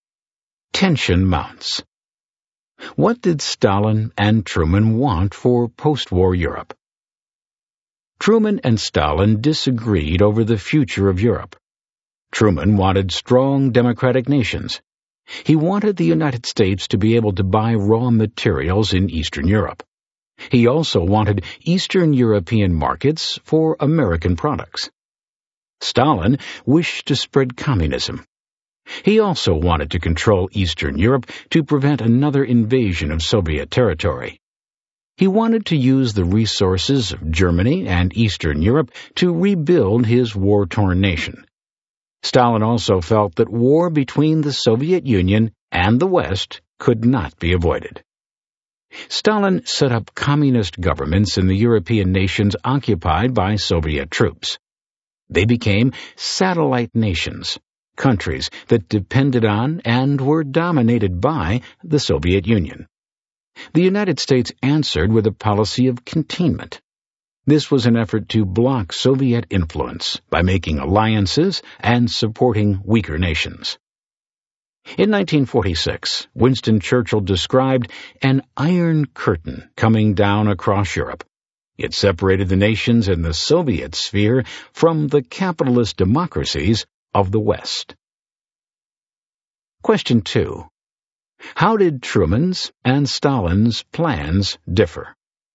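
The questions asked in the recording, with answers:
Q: How did Truman's and Stalin's plans differ?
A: Truman wanted strong democratic nations and access to Eastern European raw materials and markets; Stalin wanted to spread communism, control Eastern Europe to prevent invasion, and use its and Germany's resources to rebuild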